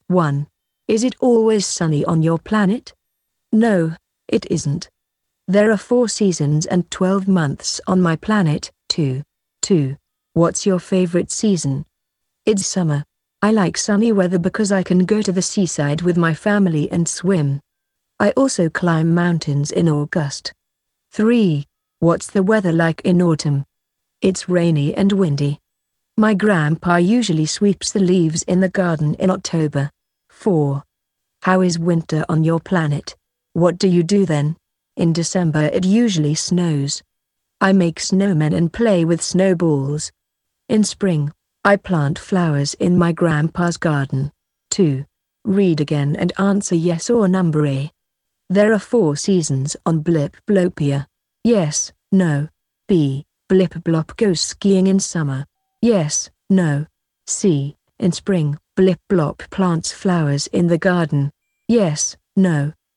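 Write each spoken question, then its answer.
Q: There are 4 seasons on Bliploppia.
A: Yes

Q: Blipblop goes skiing in summer.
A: No

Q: In spring, Blipblop plants flowers in the garden.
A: Yes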